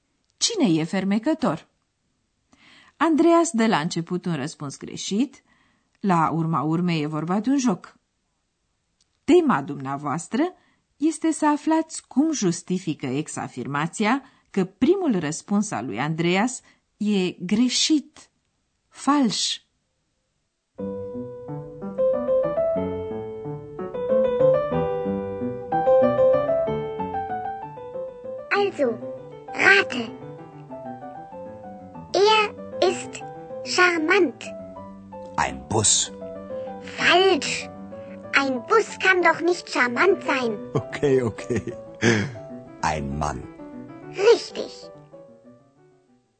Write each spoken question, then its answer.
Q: Tema dumneavoastră este să aflați cum justifică ex-afirmația că primul răspuns al lui Andreas e greșit, fals.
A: Un autobuz nu poate fi fermecător.